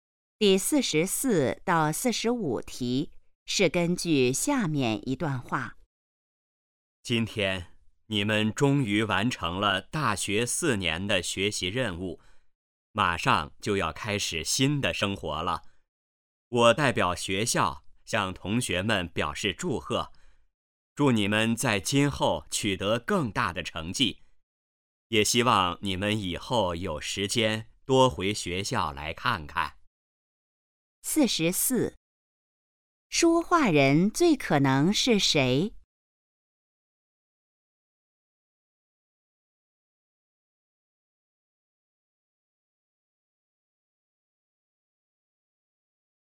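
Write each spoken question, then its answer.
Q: 这段话最可能是在什么时候说的?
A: 大学毕业时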